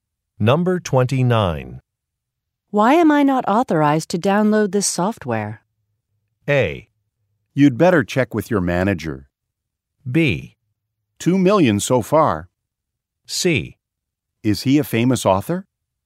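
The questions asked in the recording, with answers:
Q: Why am I not authorized to download this software?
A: A: You'd better check with your manager.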